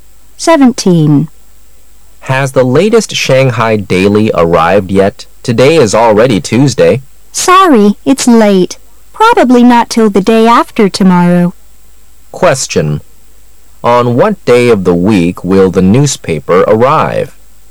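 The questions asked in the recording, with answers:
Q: On what day of the week will the newspaper arrive?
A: Thursday

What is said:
[解析] M: Has the latest Shanghai Daily arrived yet? Today is already Tuesday. W: Sorry, it's late. Probably not till the day after tomorrow. Q: On what day of the week will the newspaper arrive?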